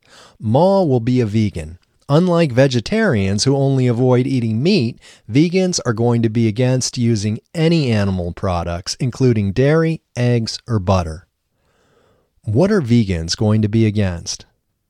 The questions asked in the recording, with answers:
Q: What are vegans going to be against?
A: Vegans are going to be against using any animal products, including dairy, eggs, or butter.